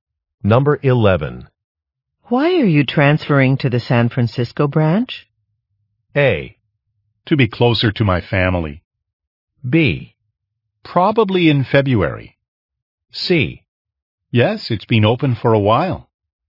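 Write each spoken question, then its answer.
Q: Why are you transferring to the San Francisco branch?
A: A: To be closer to my family.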